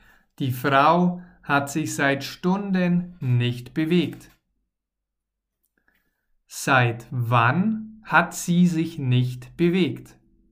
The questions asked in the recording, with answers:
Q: Seit wann hat sie sich nicht bewegt?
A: Seit Stunden. Die Frau hat sich seit Stunden